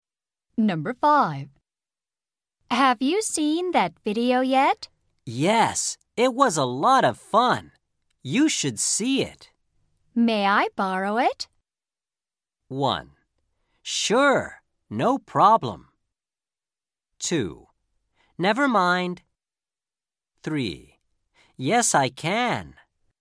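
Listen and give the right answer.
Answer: 1: Sure, no problem.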